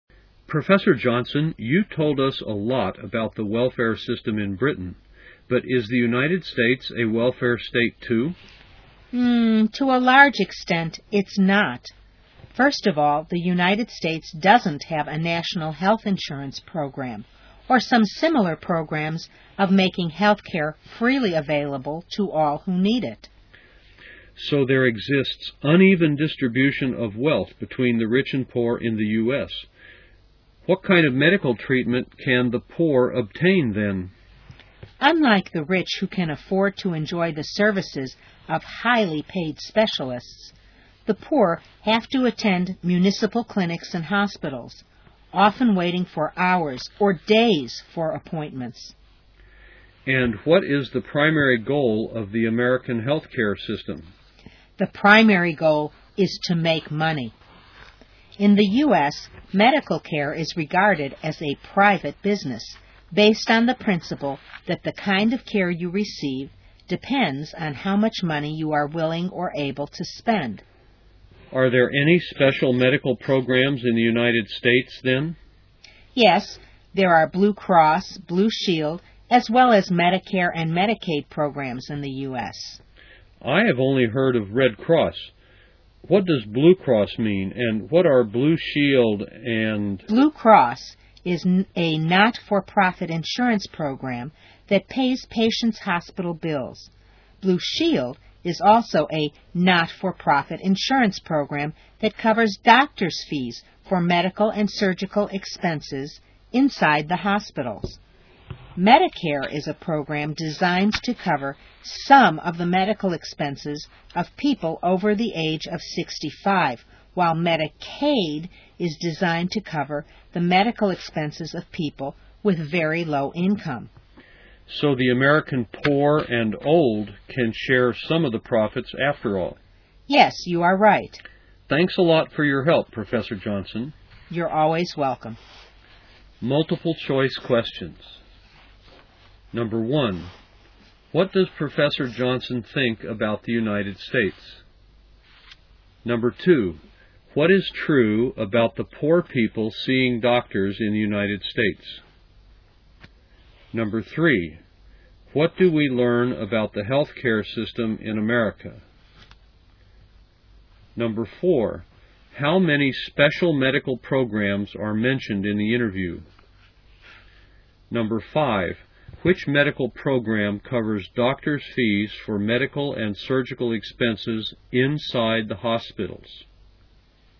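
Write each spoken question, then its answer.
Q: what does Professor Johnson think about the United States?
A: To a large extent it is not a welfare state

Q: what is true about the poor people seeing doctors in the United States?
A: They attend municipal clinics and hospitals, often waiting hours or days for appointments

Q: what do we learn about the healthcare system in America?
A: Its primary goal is to make money; medical care is a private business

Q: how many special medical programs are mentioned in the interview?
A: Four

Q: which medical program covers doctors' fees for medical and surgical expenses inside the hospitals?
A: Blue Shield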